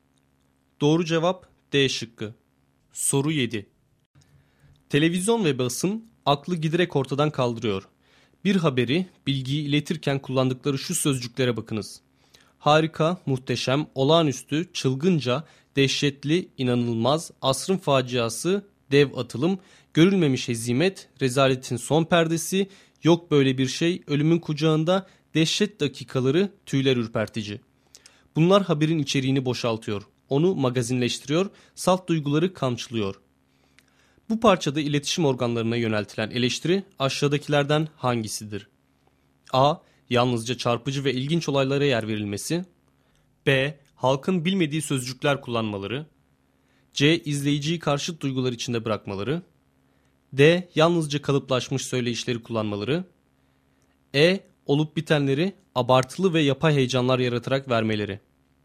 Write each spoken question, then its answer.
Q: Bu parçada iletişim organlarına yöneltilen eleştiri aşağıdakilerden hangisidir?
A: Doğru cevap E şıkkı.